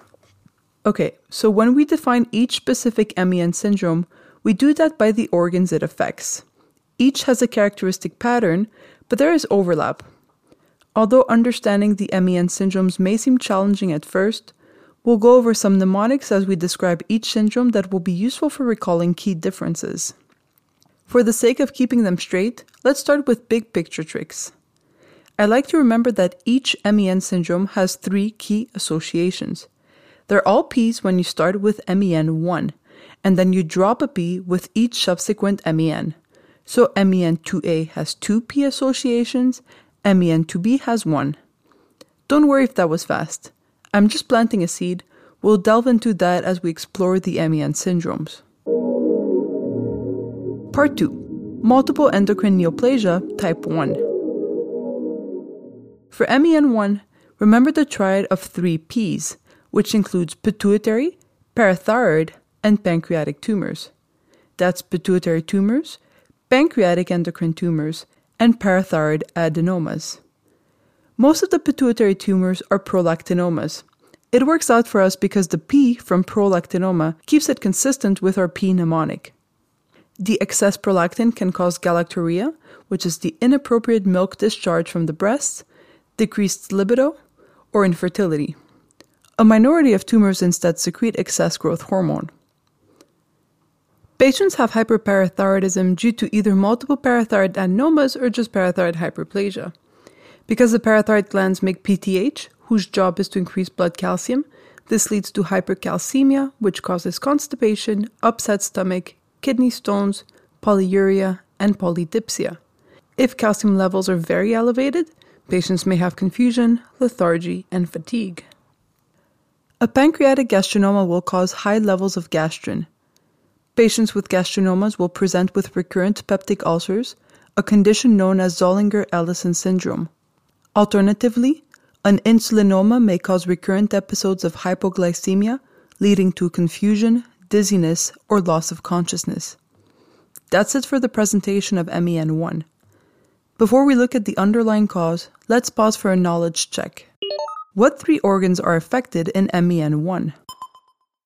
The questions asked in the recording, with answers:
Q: What three organs are affected in MEN1?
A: The three P's of MEN1 are the pituitary, pancreas, and parathyroid.